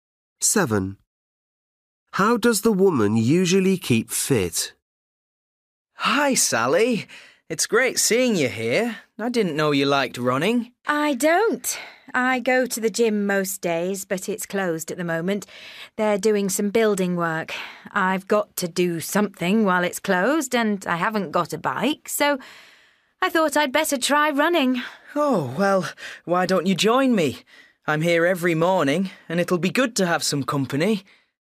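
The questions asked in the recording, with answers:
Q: How does the woman usually keep fit?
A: she goes to the gym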